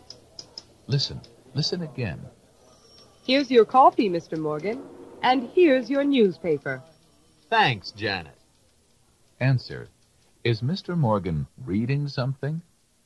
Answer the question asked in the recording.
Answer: Yes, he is.